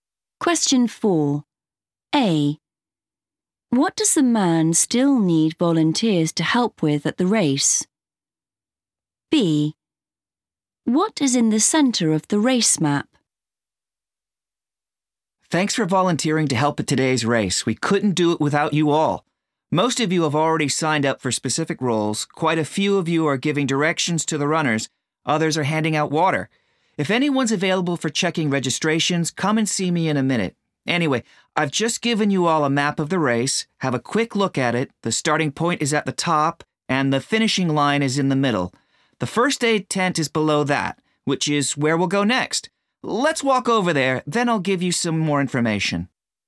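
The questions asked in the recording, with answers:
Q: What does the man still need volunteers to help with at the race?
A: checking registrations

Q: What is in the centre of the race map?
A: the finishing line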